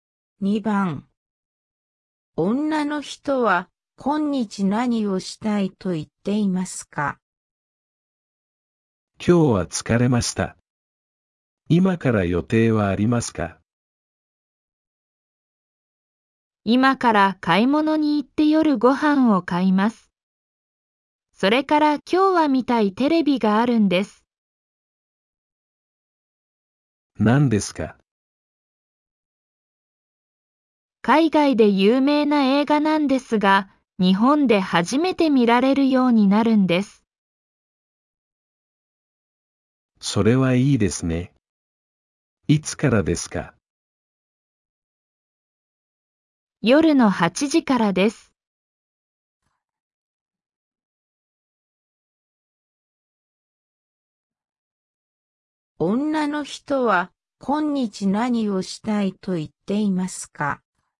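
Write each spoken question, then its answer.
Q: 女の人は今日何をしたいと言っていますか?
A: テレビで海外の有名な映画を見たい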